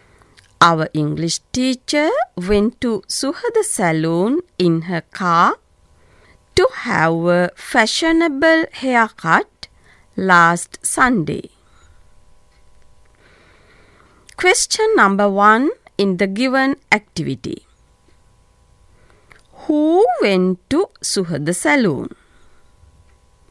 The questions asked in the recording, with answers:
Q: Who went to Suhada Saloon?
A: Then the answer is our English teacher.